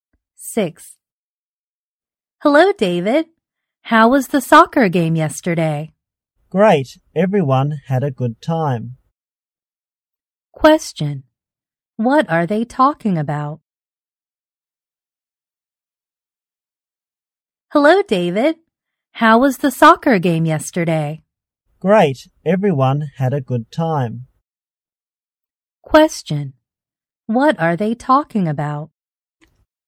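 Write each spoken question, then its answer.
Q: What are they talking about?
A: The soccer game yesterday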